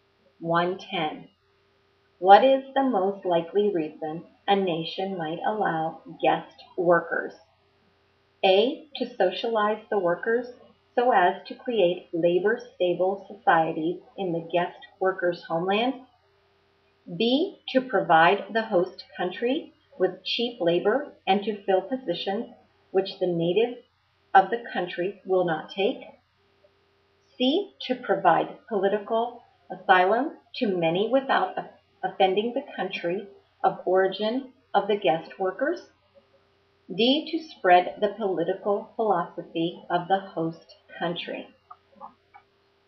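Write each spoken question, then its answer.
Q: What is the most likely reason a nation might allow guest workers?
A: B: To provide the host country with cheap labor and to fill positions which the natives of the country will not take.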